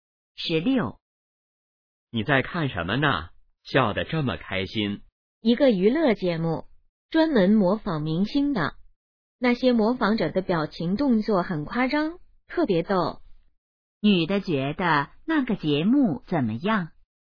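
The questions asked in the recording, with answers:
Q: 女的觉得那个节目怎么样?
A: 很逗,很好笑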